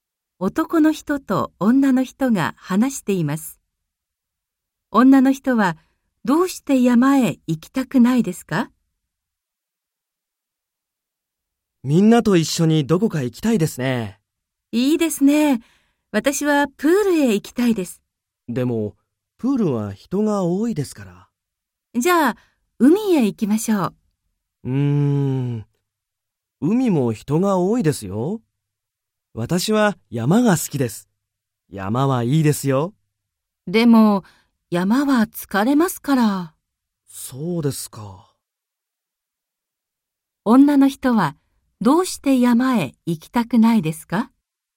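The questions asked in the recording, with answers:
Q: 女の人はどうして山へ行きたくないですか?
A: 疲れるから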